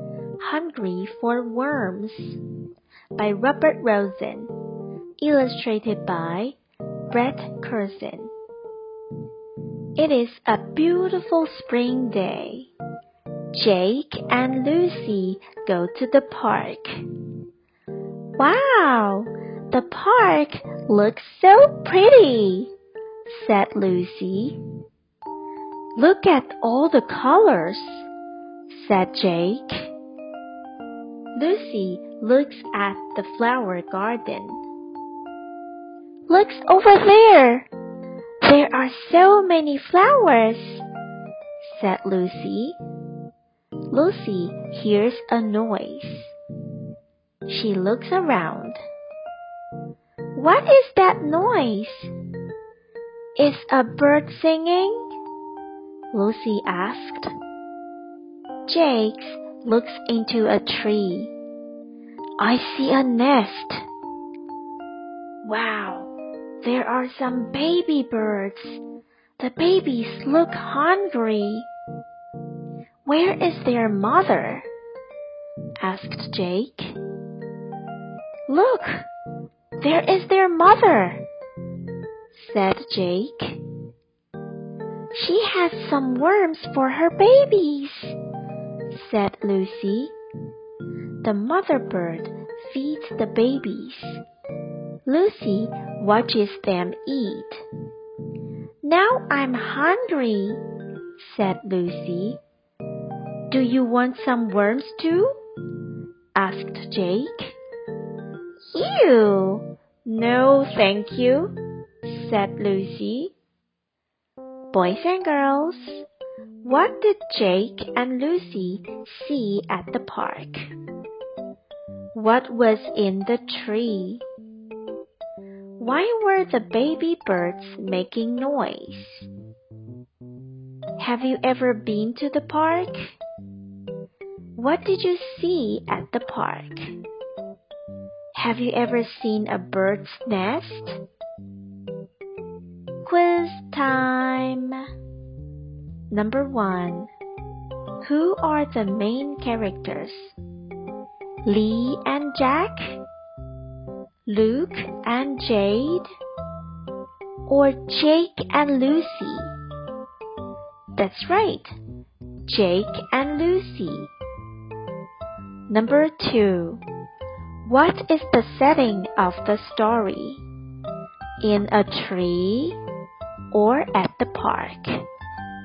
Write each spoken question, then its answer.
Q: What is the setting of the story? In a tree? or at the park.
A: That's right, at the park.